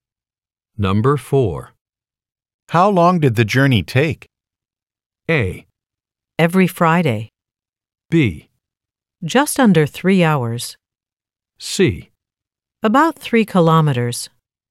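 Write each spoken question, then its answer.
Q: How long did the journey take?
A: B: Just under 3 hours.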